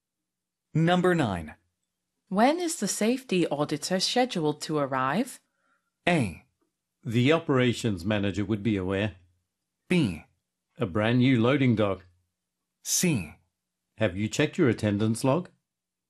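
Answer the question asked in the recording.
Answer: A: The operations manager would be aware.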